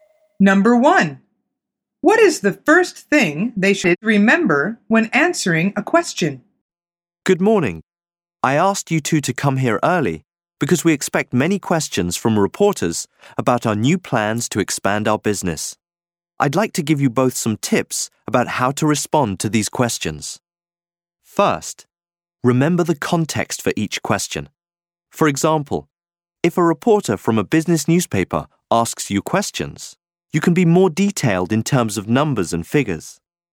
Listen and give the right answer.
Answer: The answer is the context, if the question is from a specialist or a general paper.